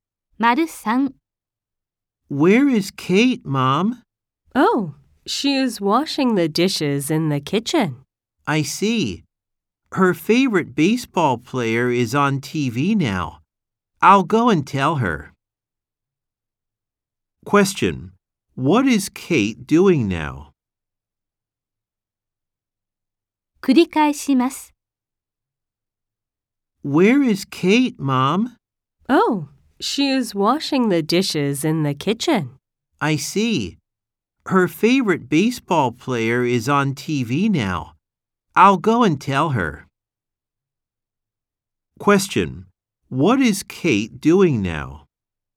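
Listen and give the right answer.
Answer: She is washing the dishes in the kitchen.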